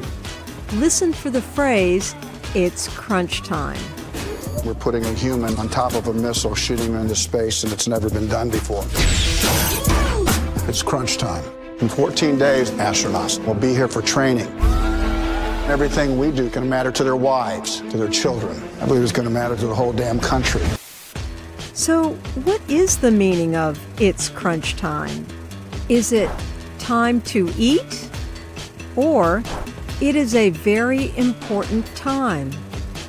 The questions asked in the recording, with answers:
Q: So what is the meaning of it's crunch time?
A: It's crunch time means it is a very important time.